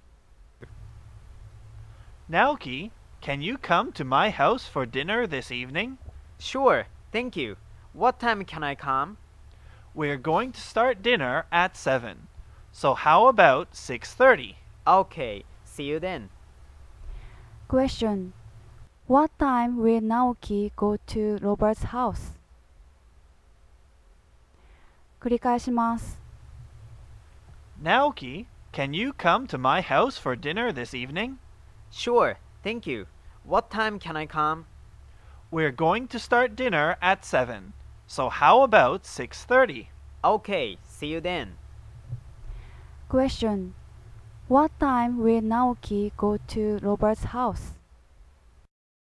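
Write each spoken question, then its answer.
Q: What time will Naoki go to Robert's house?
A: At 6:30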